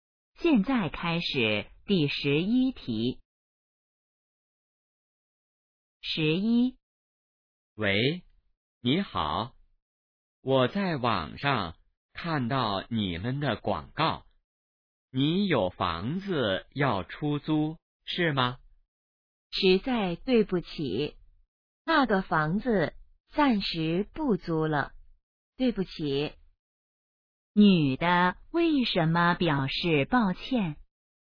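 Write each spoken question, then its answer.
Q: 女的为什么表示抱歉?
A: 房子暂时不租了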